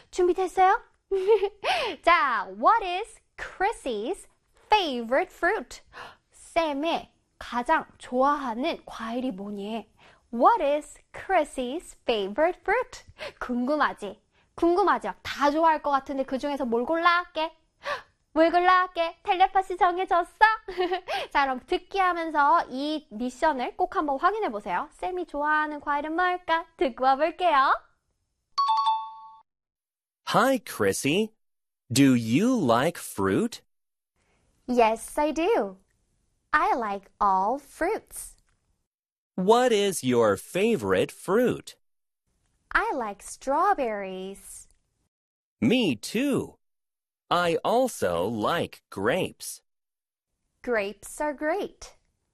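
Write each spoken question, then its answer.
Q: What is Chrissy's favorite fruit?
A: Strawberries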